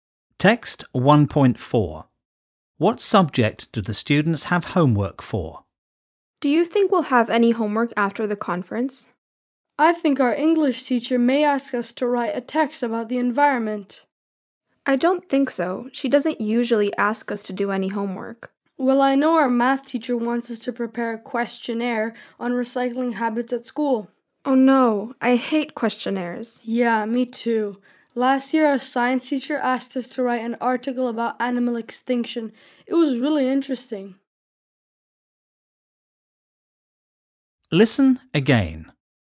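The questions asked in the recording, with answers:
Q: What subject do the students have homework for?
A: Maths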